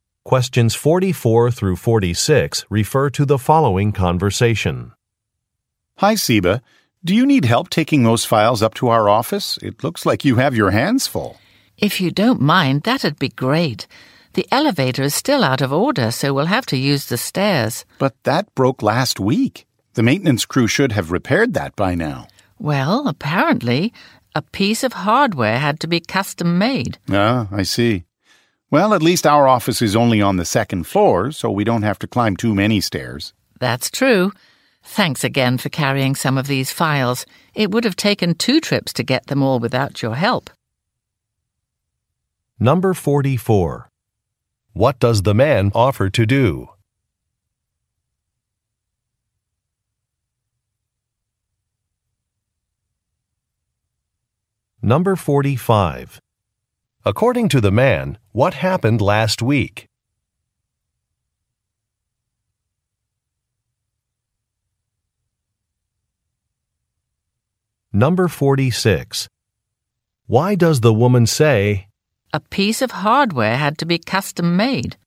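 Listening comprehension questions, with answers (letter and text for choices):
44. What does the man offer to do?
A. Meet in the lobby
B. Contact a receptionist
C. Carry some files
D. Delay a meeting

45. According to the man, what happened last week?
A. An office door would not lock.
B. A sink was installed incorrectly.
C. An elevator stopped working.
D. A document was lost.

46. Why does the woman say, "a piece of hardware had to be custom made"?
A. To justify a price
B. To explain a delay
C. To illustrate a product's age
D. To express regret for a purchase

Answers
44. C. Carry some files
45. C. An elevator stopped working.
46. B. To explain a delay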